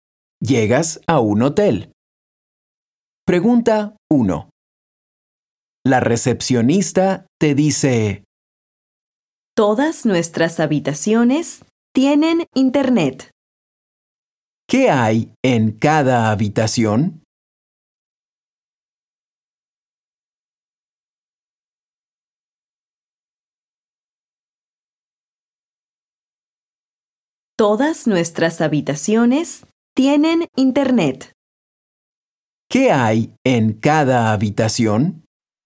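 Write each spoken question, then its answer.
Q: ¿Qué hay en cada habitación?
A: internet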